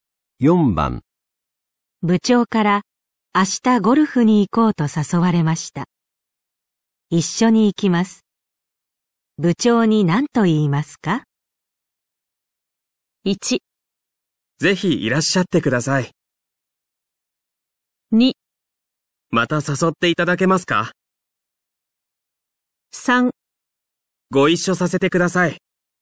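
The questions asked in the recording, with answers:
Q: 部長に何と言いますか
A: 3: ご一緒させてください。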